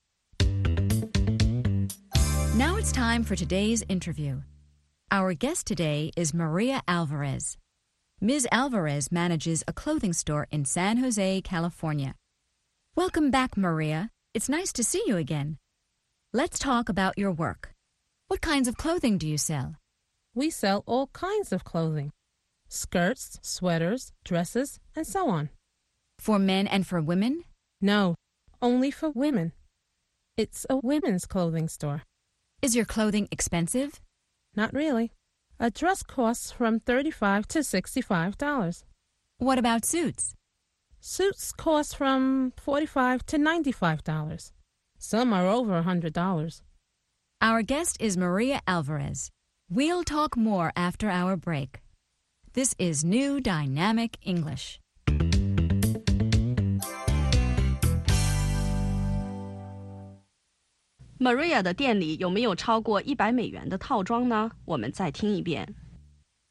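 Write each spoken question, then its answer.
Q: Maria 的店里有没有超过$100的套装呢?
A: 有,有些套装超过$100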